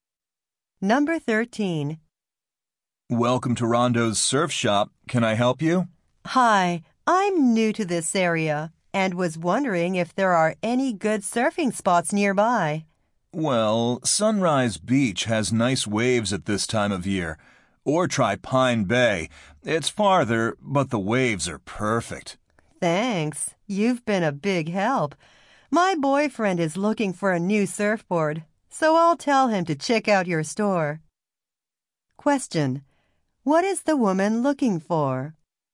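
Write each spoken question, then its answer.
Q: What is the woman looking for?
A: Good surfing spots nearby.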